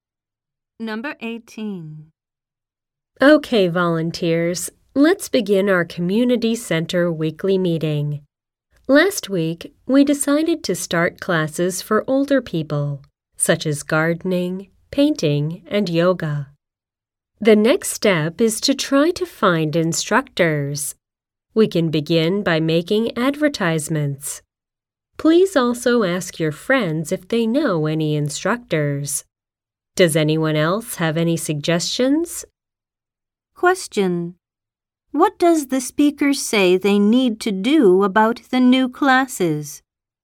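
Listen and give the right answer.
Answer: Find instructors.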